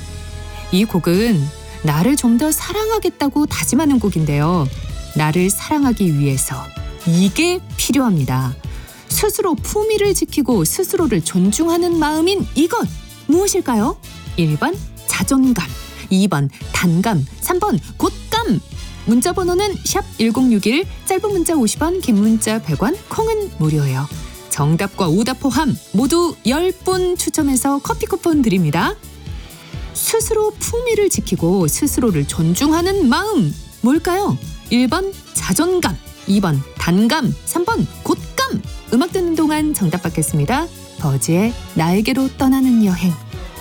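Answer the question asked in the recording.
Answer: 1: 자존감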